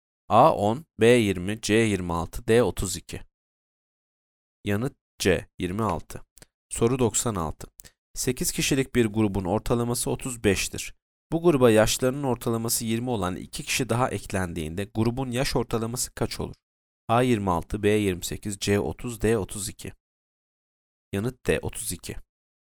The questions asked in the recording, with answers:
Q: Bu gruba yaşlarının ortalaması 20 olan 2 kişi daha eklendiğinde grubun yaş ortalaması kaç olur?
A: Yanıt D 32.